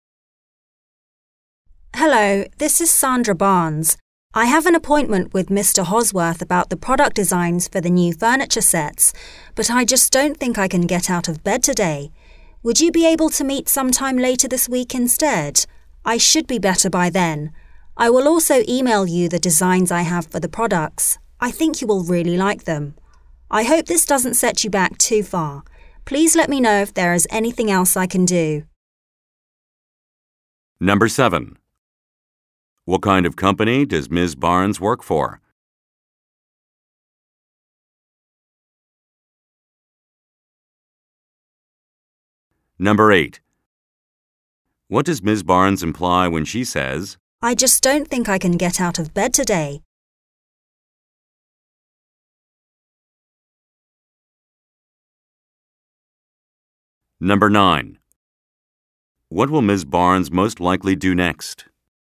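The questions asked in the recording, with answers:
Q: What does Ms. Barnes imply when she says, I just don't think I can get out of bed today.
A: She is sick

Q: What will Ms. Barnes most likely do next?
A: Email the product designs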